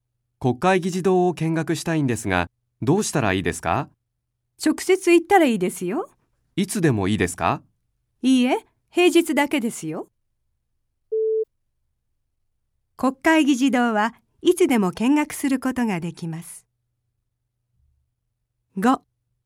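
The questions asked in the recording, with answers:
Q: 国会議事堂はいつでも見学することができます。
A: 正しくない(×):平日だけ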